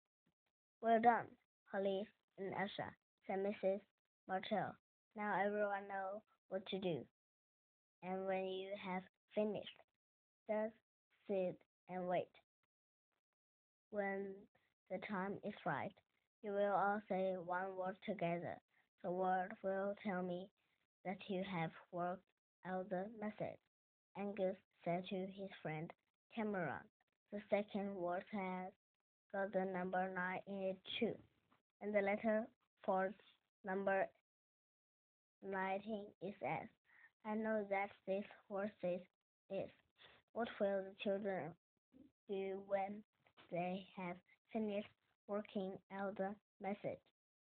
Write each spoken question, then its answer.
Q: What will the children do when they have finished working out the message?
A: They will sit and wait until the time is right.